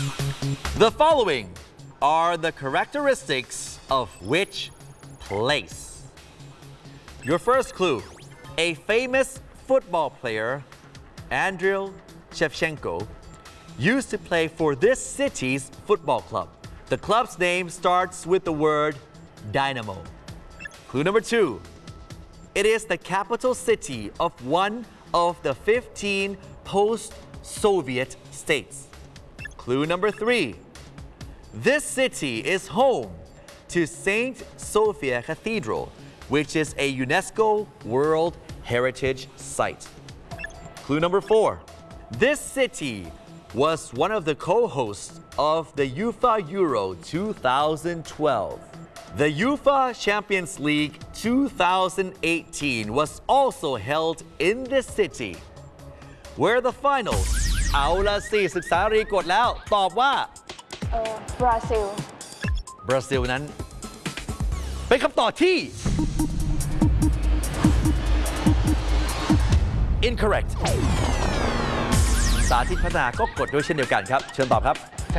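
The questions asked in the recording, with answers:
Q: The following are the characteristics of which place?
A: Kyiv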